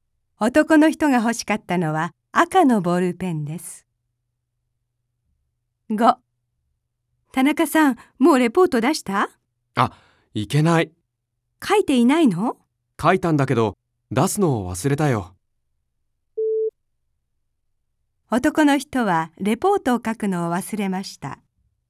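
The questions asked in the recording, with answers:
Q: 男の人はレポートを書くのを忘れました。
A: 正しくない(出すのを忘れた)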